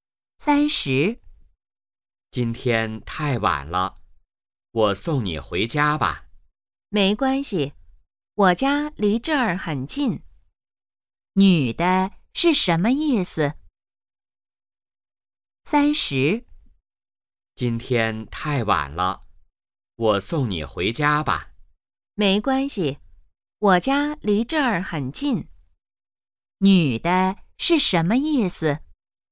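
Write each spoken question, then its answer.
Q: 女的是什么意思?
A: 不用送,她家很近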